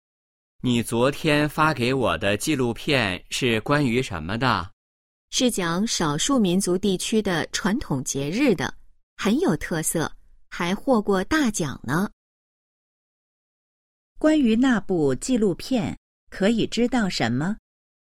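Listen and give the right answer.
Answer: 讲少数民族传统节日,获过大奖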